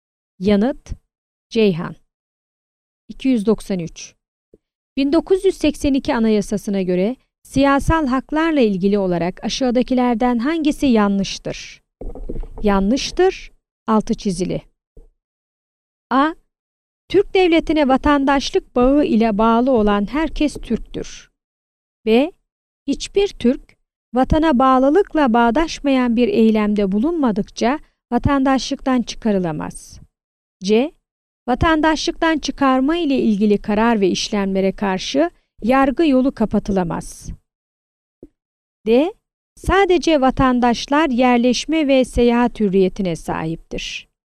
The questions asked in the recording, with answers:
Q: 1982 Anayasası'na göre siyasal haklarla ilgili olarak aşağıdakilerden hangisi yanlıştır?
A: Yanıt: Diyarbakır.